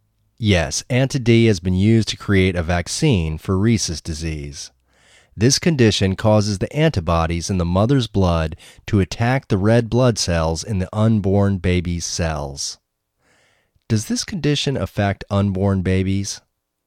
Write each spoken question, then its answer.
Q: Does this condition affect unborn babies?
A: Yes, this condition affects unborn babies.